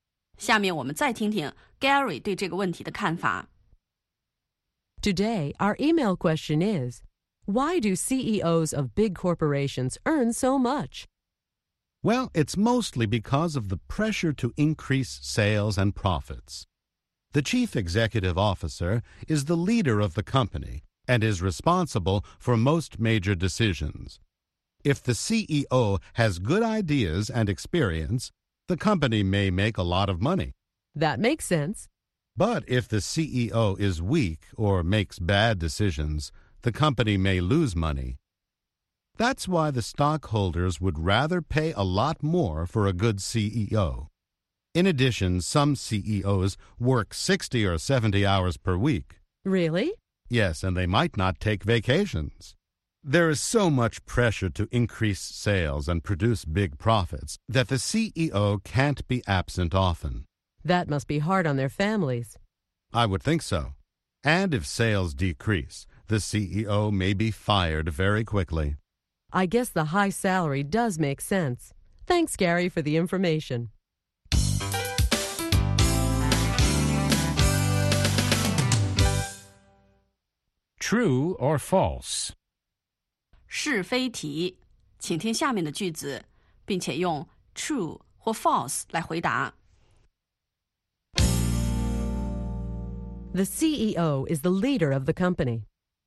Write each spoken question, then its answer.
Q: The CEO is the leader of the company.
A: True, the chief executive officer is responsible for most major decisions.